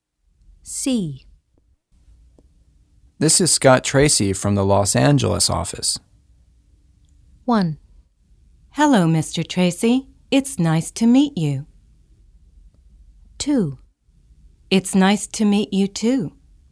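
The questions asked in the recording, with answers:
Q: This is Scott Tracy from the Los Angeles office.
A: 1: Hello, Mr. Tracy. It's nice to meet you.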